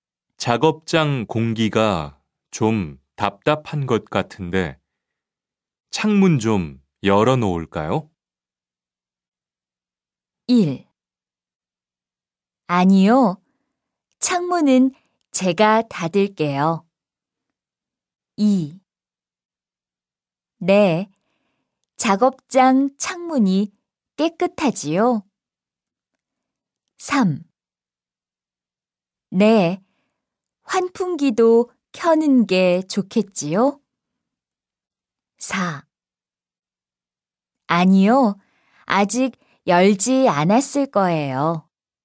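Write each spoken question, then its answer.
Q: 작업장 공기가 좀 답답한 것 같은데 창문 좀 열어놓을까요?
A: 3: 네. 환풍기도 켜는 게 좋겠지요?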